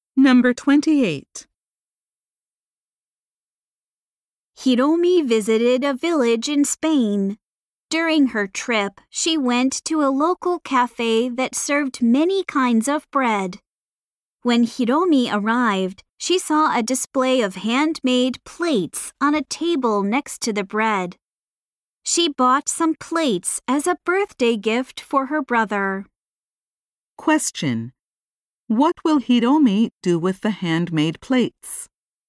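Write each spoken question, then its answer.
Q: What will Hiromi do with the handmade plates?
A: Give them to her brother as a birthday gift.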